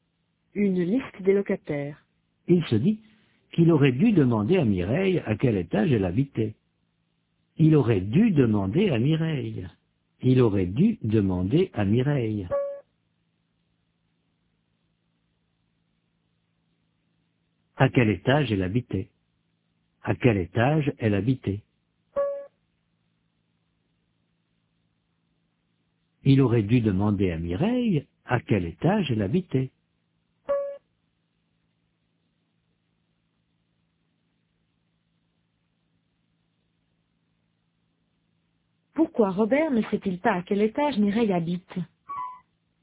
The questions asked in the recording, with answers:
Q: Pourquoi Robert ne sait-il pas à quel étage Mireille habite?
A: Parce qu'il n'a pas demandé à Mireille à quel étage elle habitait.